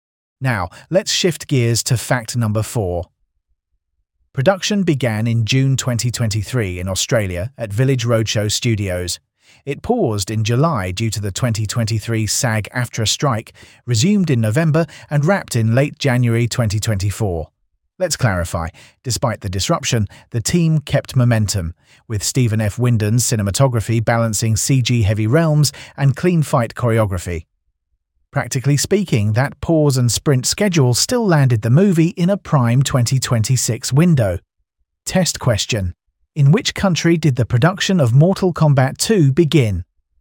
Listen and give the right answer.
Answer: Correct answer. Australia.